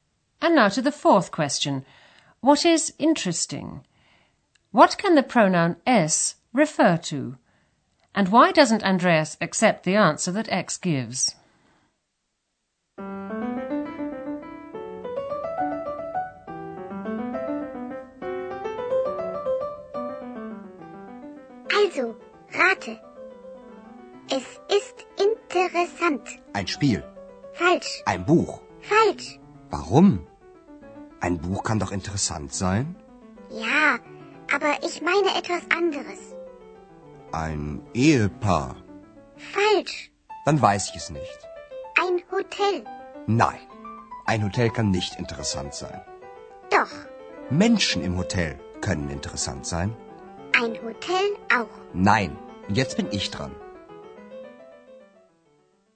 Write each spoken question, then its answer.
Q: And why doesn't Andreas accept the answer that X gives?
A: It's the people in the hotel who are interesting, he says.